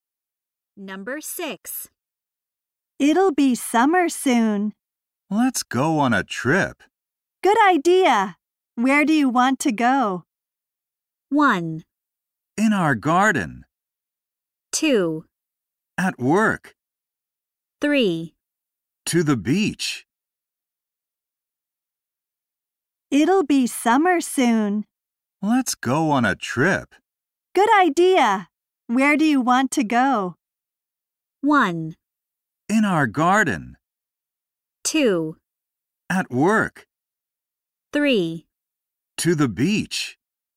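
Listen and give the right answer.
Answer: 3: To the beach.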